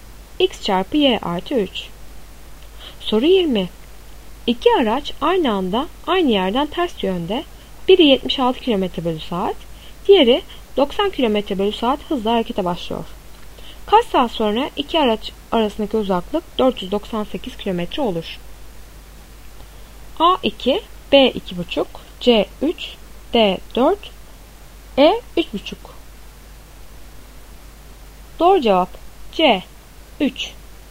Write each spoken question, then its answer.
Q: Kaç saat sonra iki araç arasındaki uzaklık 498 km olur?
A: Doğru cevap C 3.